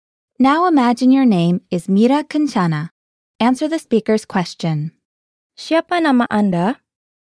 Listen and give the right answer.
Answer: Nama saya adalah Mira Kencana.